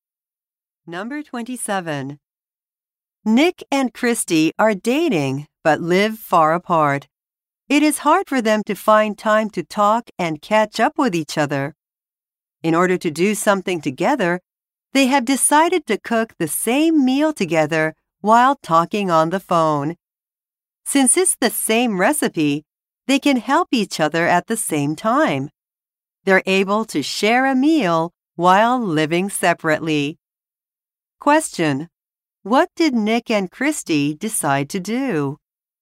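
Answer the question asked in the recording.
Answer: Cook the same meal together while talking on the phone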